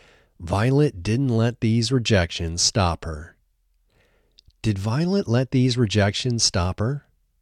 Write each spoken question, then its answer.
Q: Did Violet let these rejections stop her?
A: No, Violet didn't let these rejections stop her.